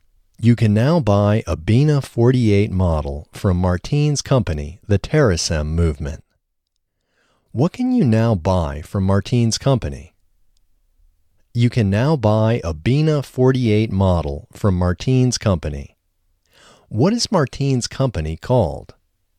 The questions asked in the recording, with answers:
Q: What can you now buy from Martine's company?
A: You can now buy a Bina 48 model from Martine's company.

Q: What is Martine's company called?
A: Martine's company is called the TerraSem Movement.